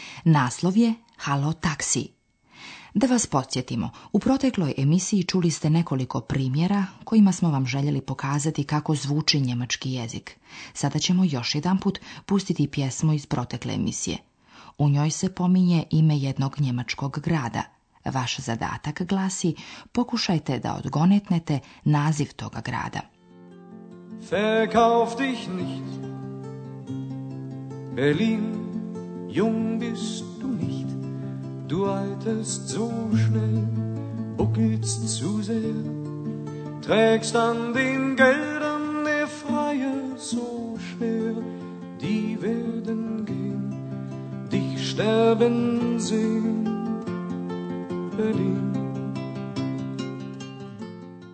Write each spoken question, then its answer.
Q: Vaš zadatak glasi, pokušajte da odgonetnete naziv toga grada.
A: Berlin. Berlin.